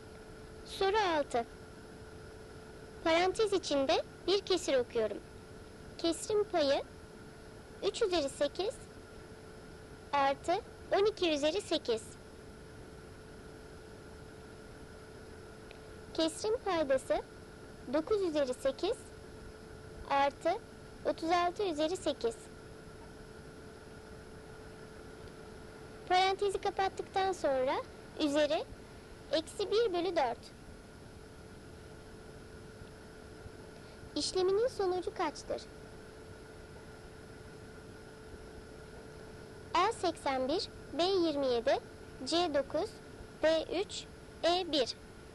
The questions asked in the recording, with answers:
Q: İşleminin sonucu kaçtır?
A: Doğru cevap C 9.